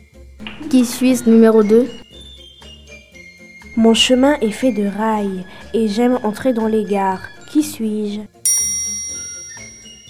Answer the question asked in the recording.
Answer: Un train.